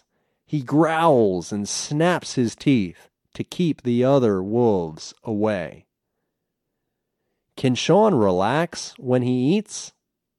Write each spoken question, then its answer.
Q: Can Sean relax when he eats?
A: No, he can't relax.